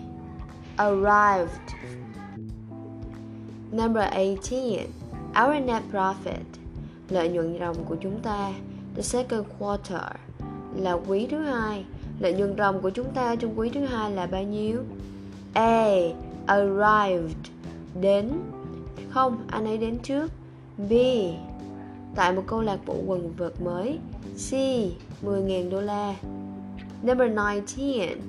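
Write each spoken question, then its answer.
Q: Lợi nhuận ròng của chúng ta trong quý thứ hai là bao nhiêu?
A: C: 10.000 đô la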